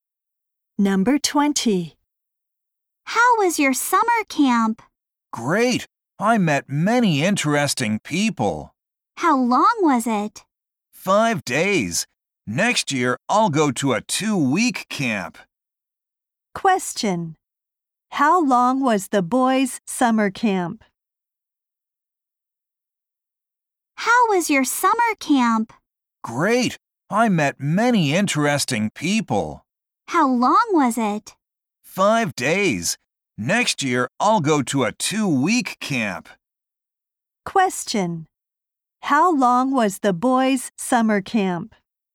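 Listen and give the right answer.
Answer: 5 days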